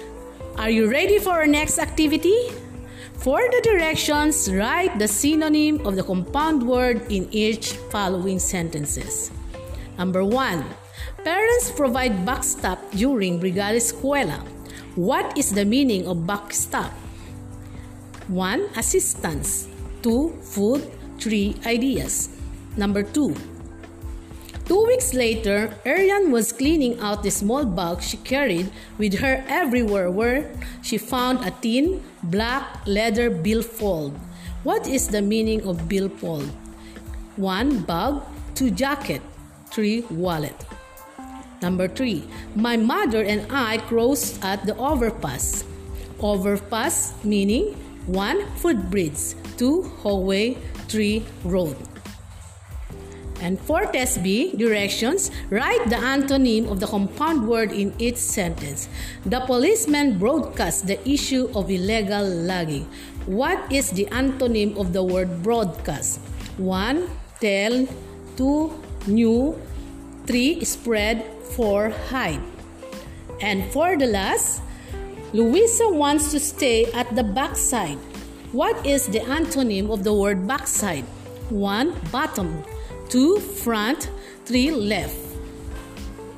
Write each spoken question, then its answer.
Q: What is the meaning of backstop?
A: For number 1, we have assistance.

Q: What is the meaning of billfold?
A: Number 2, wallet.

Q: Overpass meaning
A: Number 3, footbridge.

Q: What is the antonym of the word broadcast?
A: Number 4, hide.

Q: What is the antonym of the word backside?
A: And number 5, front.